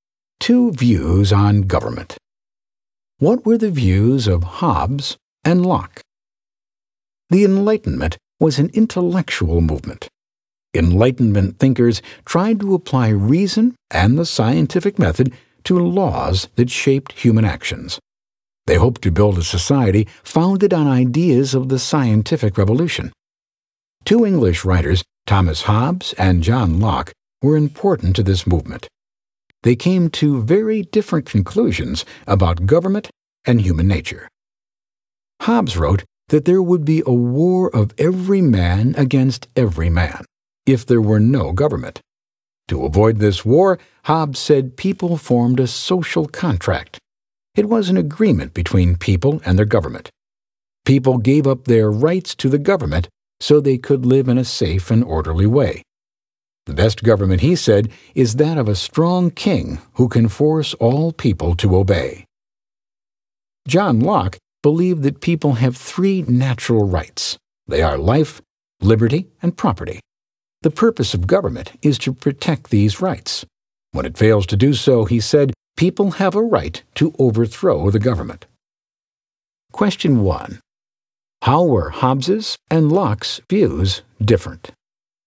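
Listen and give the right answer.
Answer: Hobbes thought people should give up their rights to a strong king who keeps order; Locke thought people have natural rights to life, liberty and property that the government must protect, and that people may overthrow a government that fails to do this.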